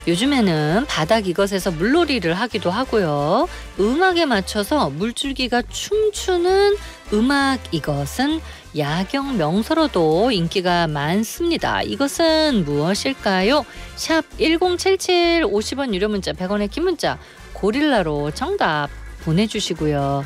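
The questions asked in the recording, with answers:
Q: 이것은 무엇일까요?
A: 분수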